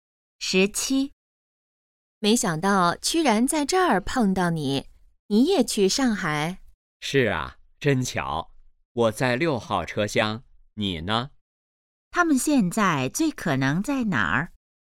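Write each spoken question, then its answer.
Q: 他们现在最可能在哪儿?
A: 火车上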